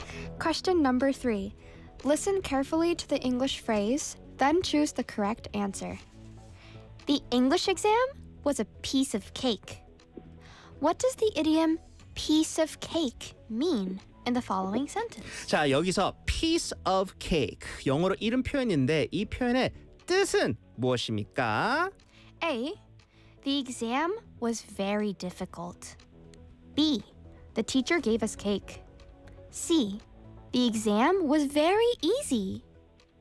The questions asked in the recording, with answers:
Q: What does the idiom piece of cake mean in the following sentence?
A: The exam 네. was very easy.